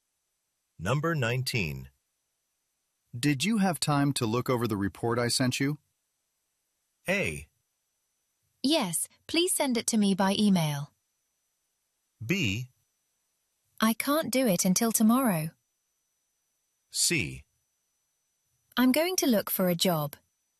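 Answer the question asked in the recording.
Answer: B: I can't do it until tomorrow.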